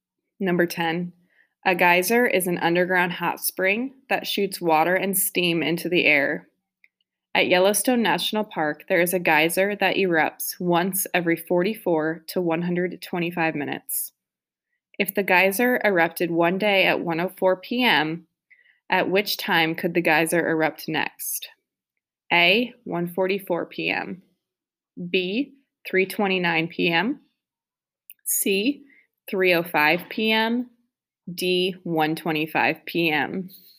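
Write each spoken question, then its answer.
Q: If the geyser erupted one day at 1:04 p.m., at which time could the geyser erupt next?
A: C: 3:05 p.m.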